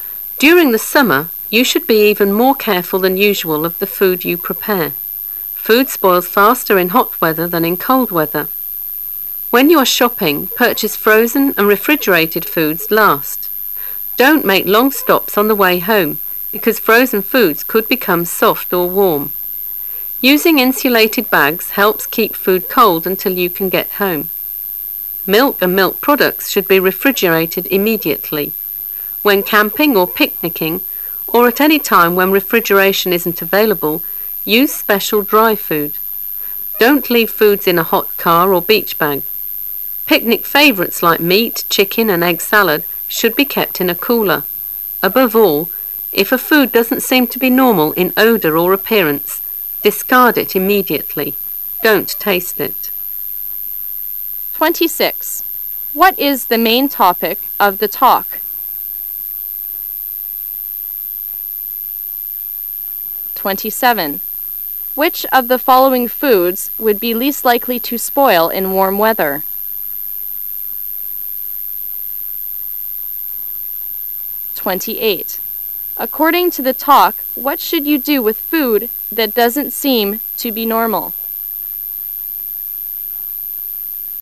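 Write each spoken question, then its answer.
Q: What is the main topic of the talk?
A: Keeping food safe in hot summer weather

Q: According to the talk, what should you do with food that doesn't seem to be normal?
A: Discard it immediately without tasting it

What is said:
[解析] 26-28 During the summer you should be even more careful than usual of the food you prepare. Food spoils faster in hot weather than in cold weather. When you are shopping, purchase frozen and refrigerated foods at last. Don't make long stops on the way home, because frozen foods could become soft or warm. Using insulated bags helps keep food cold until you can get home. Milk and milk products should be refrigerated immediately. When camping or picnicking, or at any time [27] when refrigeration isn't available, use special dry food. Don't leave foods in a hot car or beach bag. Picnic favorites like meat, chicken, and egg salad should be kept in a cooler. 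Above all, if a food doesn't seem to be normal in odor or appearance, [28] discard it immediately. Don't taste it.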